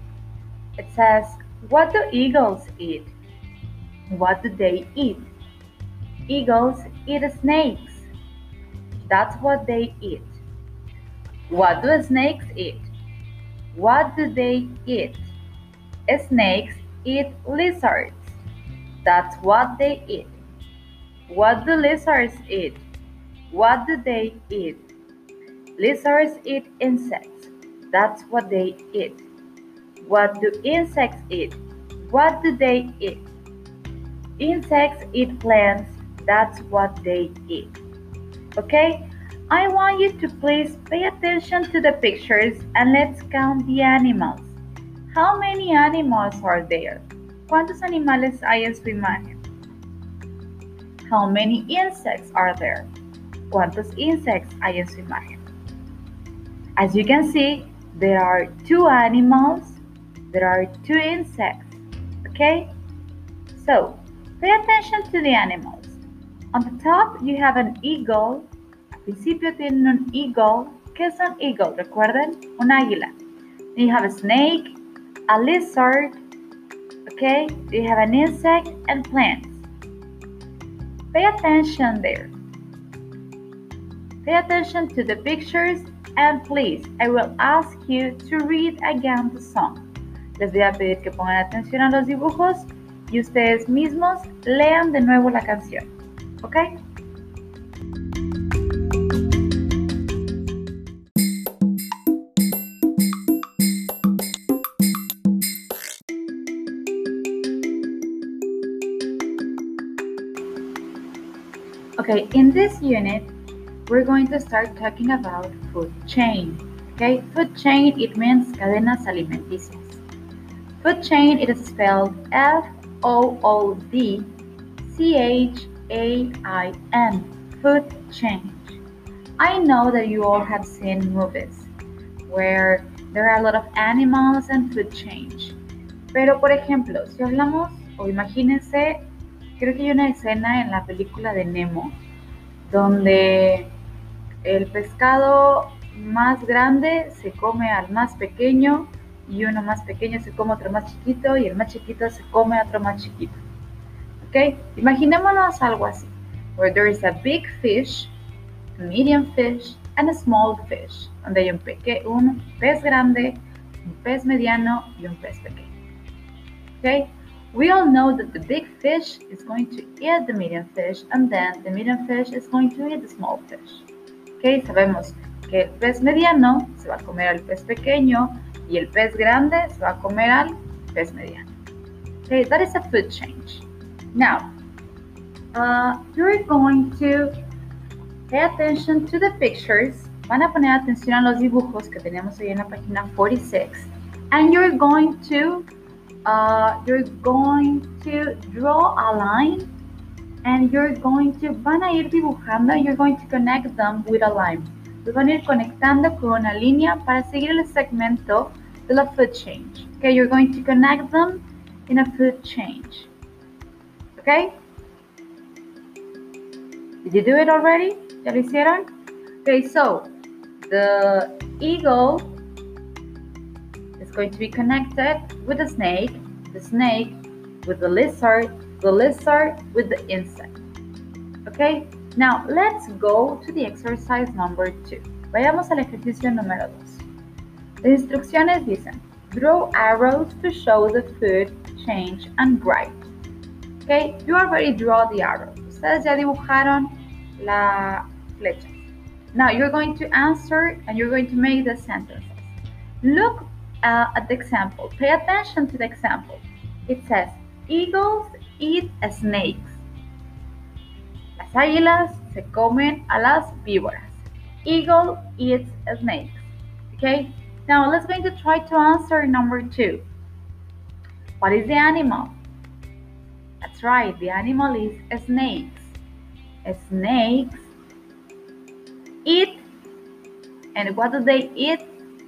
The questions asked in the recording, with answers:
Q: Snakes eat, and what do they eat?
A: Excellent, lizards.